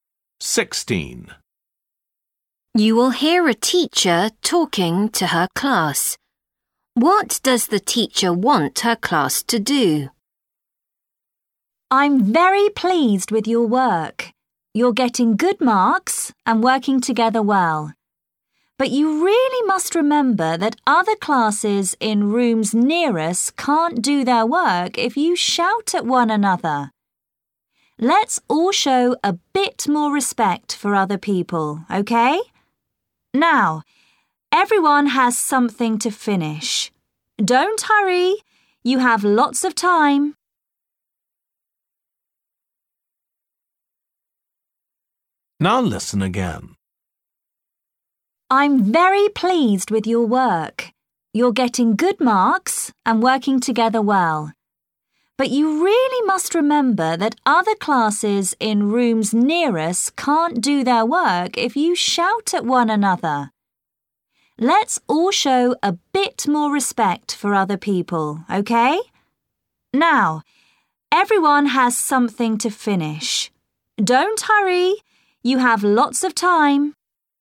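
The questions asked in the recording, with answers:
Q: What does the teacher want her class to do?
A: Be quieter and not shout, out of respect for other classes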